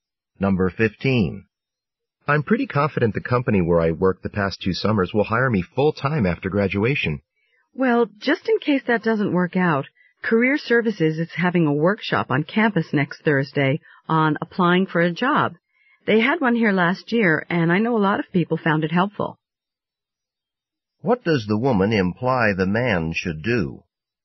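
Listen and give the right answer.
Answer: Go to the Career Services job-application workshop in case the job doesn't work out.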